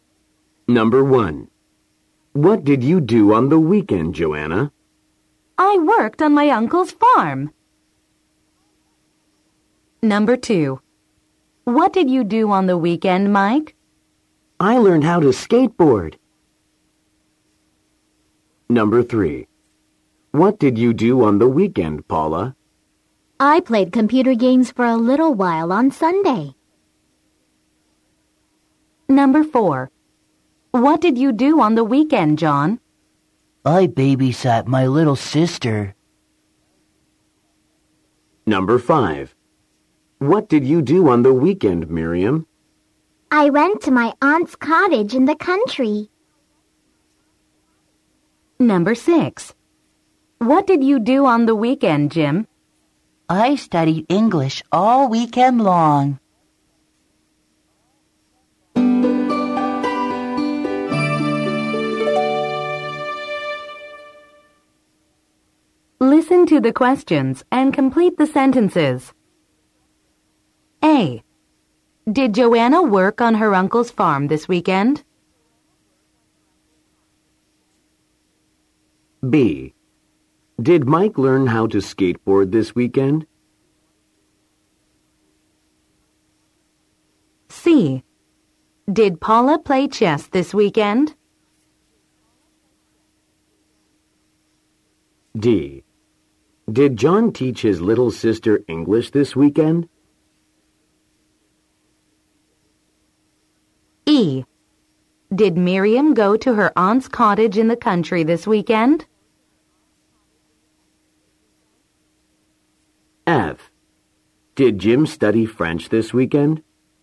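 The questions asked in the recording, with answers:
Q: Did Joanna work on her uncle's farm this weekend?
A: Yes, she did.

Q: Did Mike learn how to skateboard this weekend?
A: Yes, he did.

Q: Did Paula play chess this weekend?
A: No, she didn't. She played computer games.

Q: Did John teach his little sister English this weekend?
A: No, he didn't. He babysat his little sister.

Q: Did Miriam go to her aunt's cottage in the country this weekend?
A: Yes, she did.

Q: Did Jim study French this weekend?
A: No, he didn't. He studied English.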